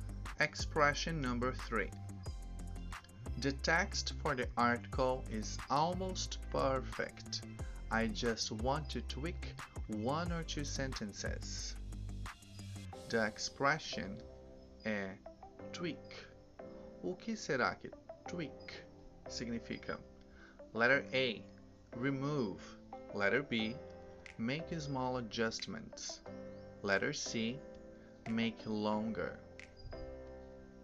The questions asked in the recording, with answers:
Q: O que será que tweak significa?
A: Answer letter B. Make small adjustments.